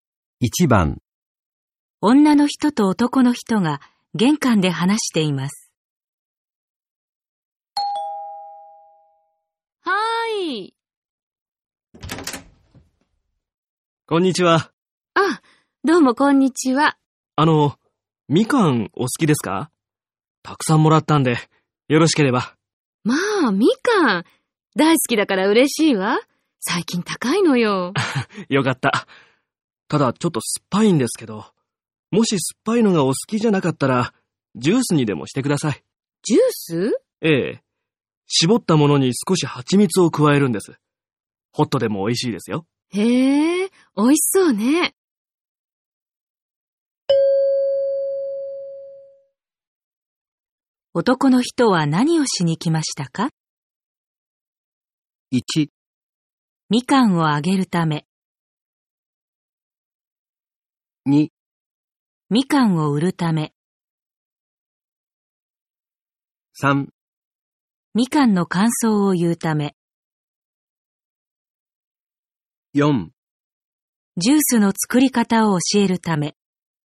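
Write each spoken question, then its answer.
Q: 男の人は何をしに来ましたか?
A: 1: みかんをあげるため。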